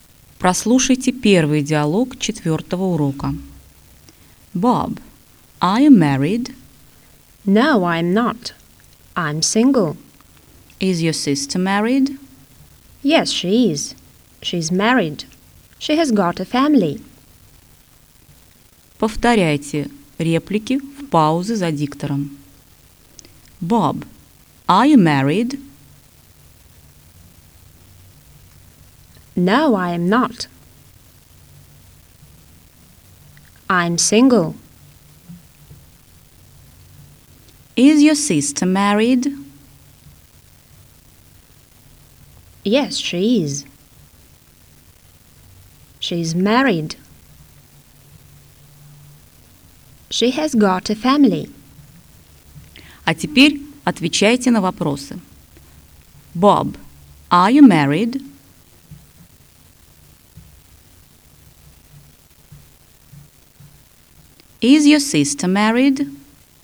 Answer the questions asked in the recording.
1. No, I'm not. I'm single.
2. Yes, she is. She's married.